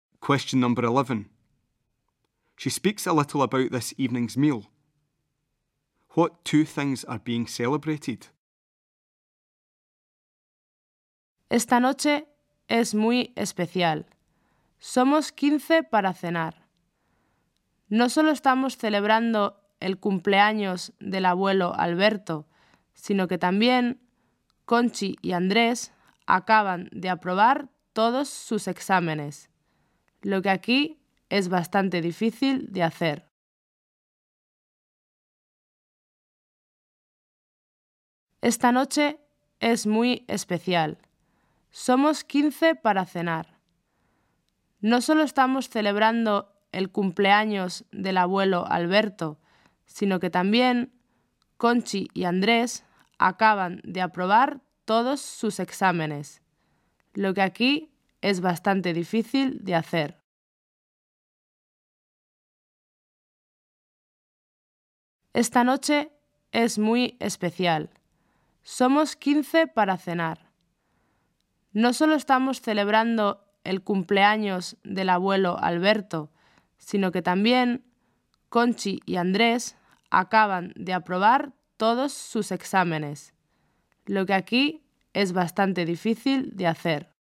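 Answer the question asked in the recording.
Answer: Grandfather Alberto's birthday and Conchi and Andrés passing all their exams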